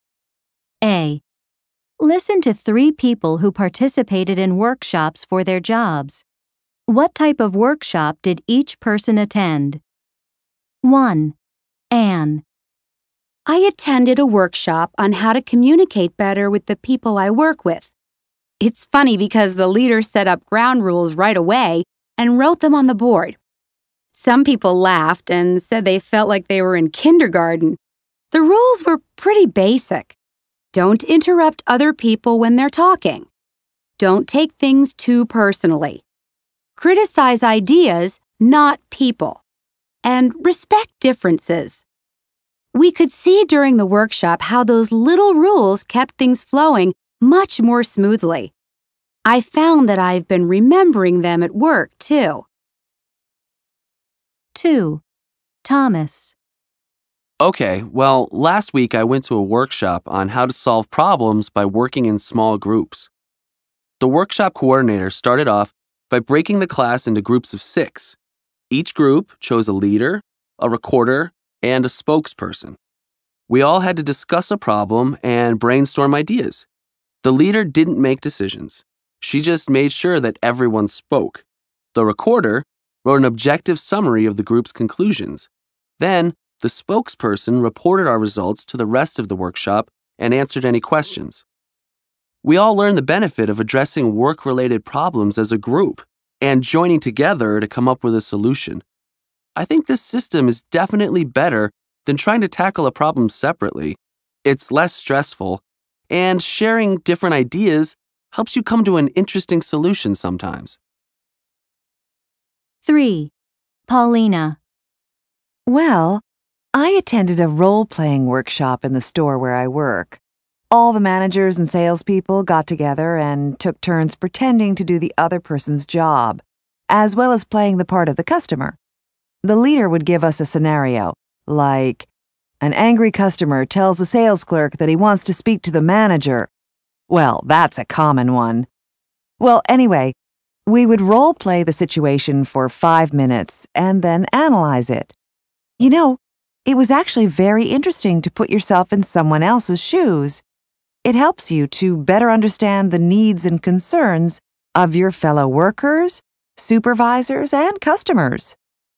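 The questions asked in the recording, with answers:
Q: What type of workshop did each person attend? 1. Anne.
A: A workshop on how to communicate better with coworkers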